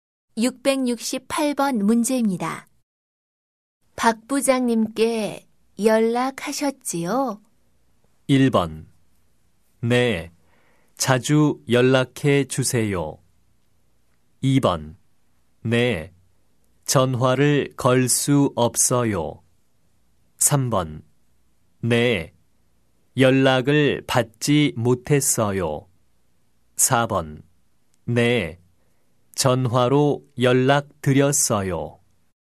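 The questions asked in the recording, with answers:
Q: 박 부장님께 연락하셨지요?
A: 4: 네, 전화로 연락 드렸어요.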